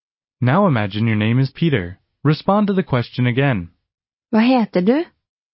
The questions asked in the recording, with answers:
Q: Respond to the question again.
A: Jeg heter Peter.